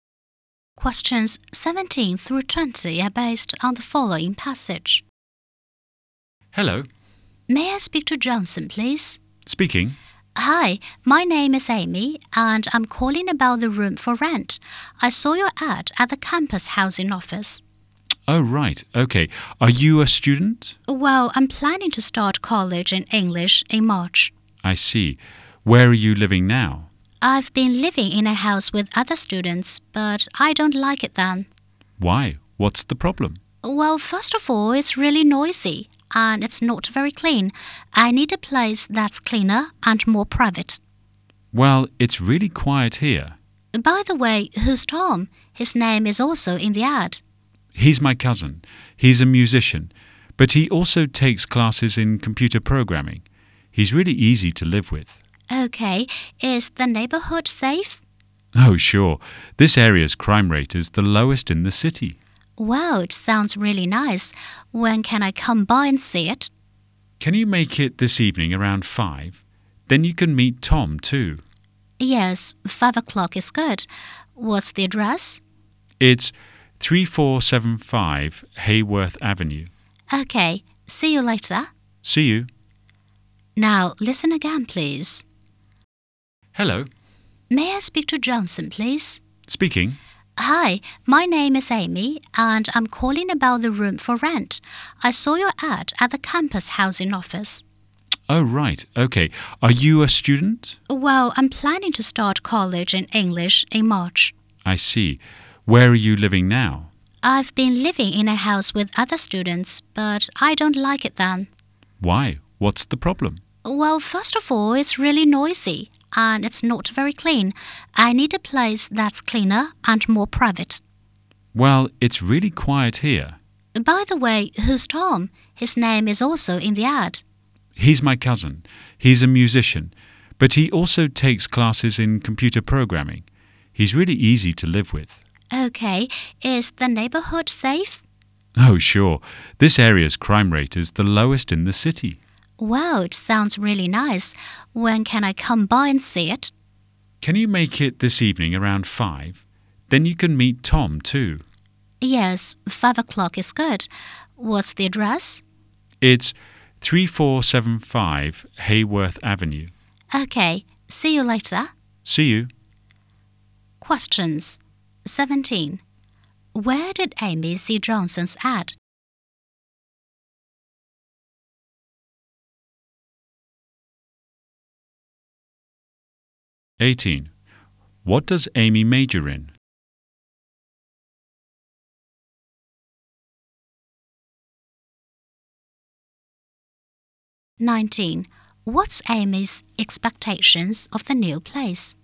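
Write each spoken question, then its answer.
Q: Where did Amy see Johnson's ad?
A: At the campus housing office

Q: What does Amy major in?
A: English

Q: What's Amy's expectations of the new place?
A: Cleaner and more private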